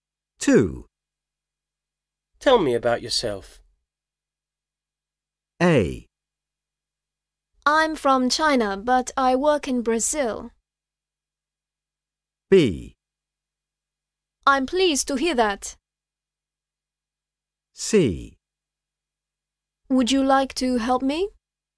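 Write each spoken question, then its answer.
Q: Tell me about yourself.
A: A: I'm from China, but I work in Brazil.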